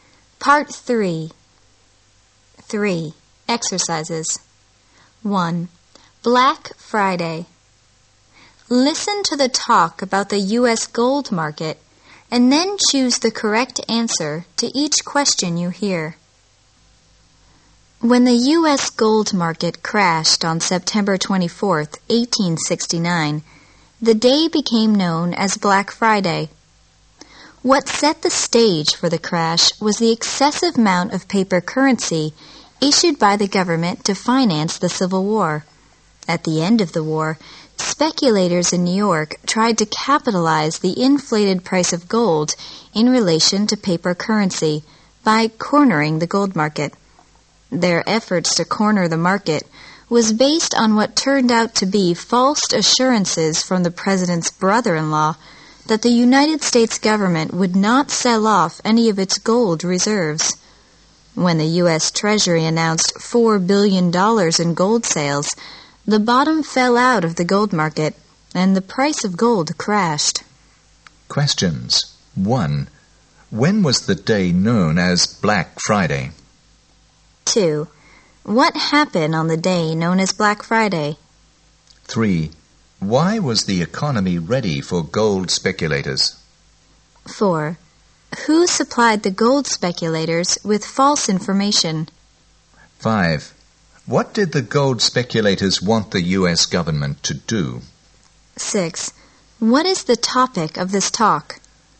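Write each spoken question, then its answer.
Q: When was the day known as Black Friday?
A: September 24, 1869

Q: What happened on the day known as Black Friday?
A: The U.S. gold market crashed

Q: Why was the economy ready for gold speculators?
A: The government had issued too much paper currency to finance the Civil War

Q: Who supplied the gold speculators with false information?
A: The president's brother-in-law

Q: What did the gold speculators want the U.S.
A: Not to sell off any of its gold reserves

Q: What is the topic of this talk?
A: The Black Friday crash of the U.S. gold market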